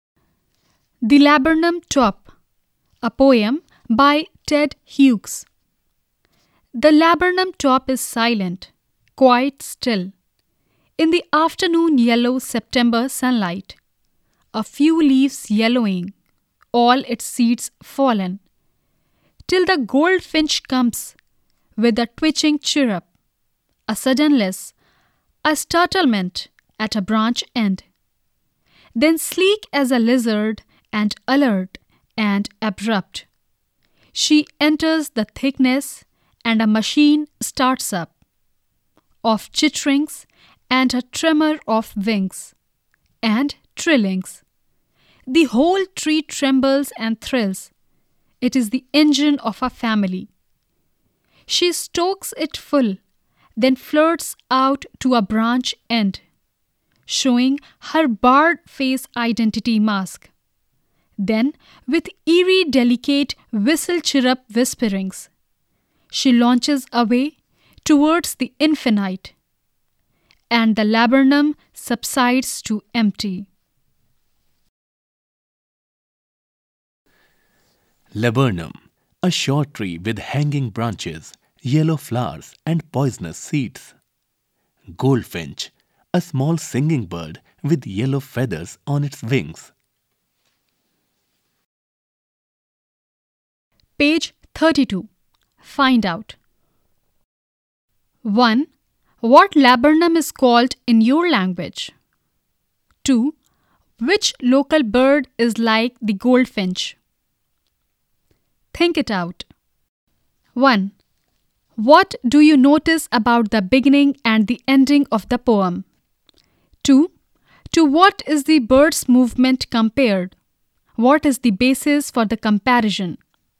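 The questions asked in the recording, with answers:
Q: To what is the bird's movement compared?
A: A lizard

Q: What is the basis for the comparison?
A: Like a lizard, the bird moves in a sleek, alert and abrupt way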